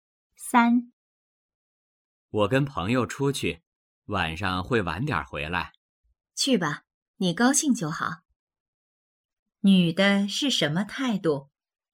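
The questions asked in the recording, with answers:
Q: 女的是什么态度?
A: 同意,支持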